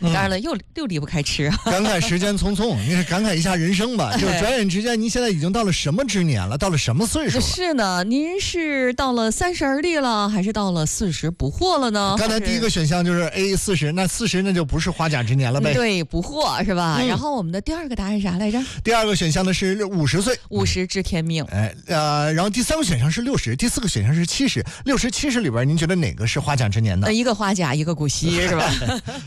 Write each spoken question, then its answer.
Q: 60、70里边,您觉得哪个是花甲之年呢?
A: 花甲之年在古时指的是60岁啊